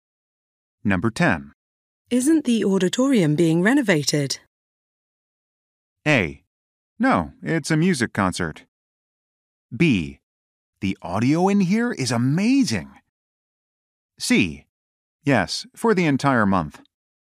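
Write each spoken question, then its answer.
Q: Isn't the auditorium being renovated?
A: C: Yes, for the entire month.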